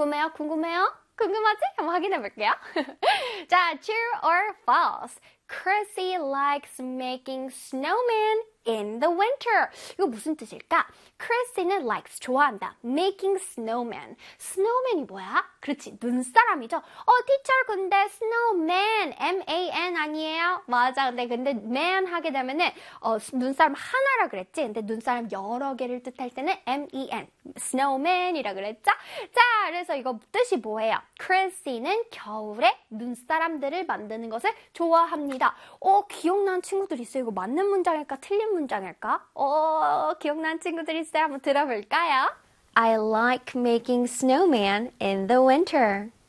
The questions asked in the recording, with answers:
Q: Chrissy likes making snowmen in the winter.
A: 정답은 true가 되었죠.